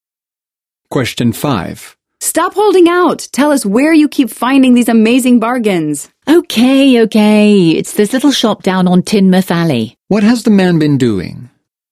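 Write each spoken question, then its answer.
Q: What has the man been doing?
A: Keeping secret where he finds bargains (a little shop on Tynmouth Alley).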